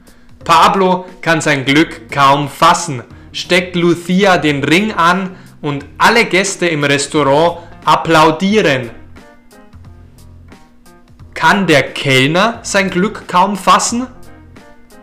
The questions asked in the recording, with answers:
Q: Kann der Kellner sein Glück kaum fassen?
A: Nein, Pablo kann sein Glück kaum fassen.